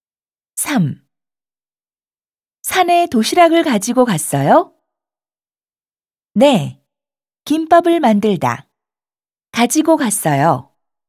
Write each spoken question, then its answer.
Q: 산에 도시락을 가지고 갔어요?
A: 네. 김밥을 만들어서 가지고 갔어요.